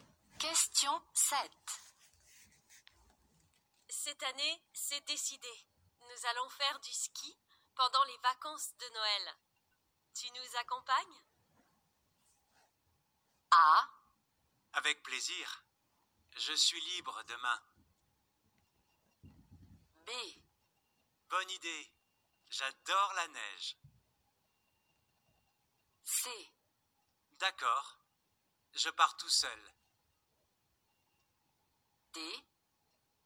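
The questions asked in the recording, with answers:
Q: Tu nous accompagnes?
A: B: Bonne idée. J'adore la neige.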